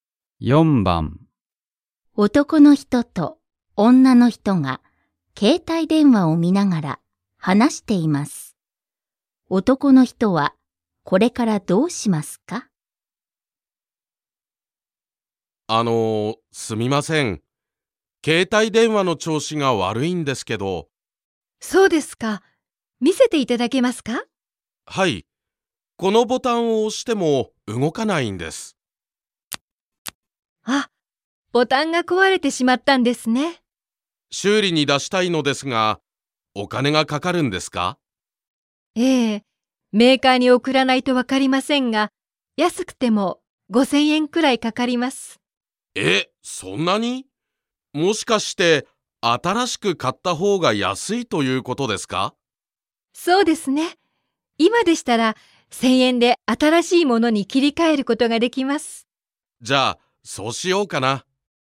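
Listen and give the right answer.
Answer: 1000円で新しい携帯電話に切り替える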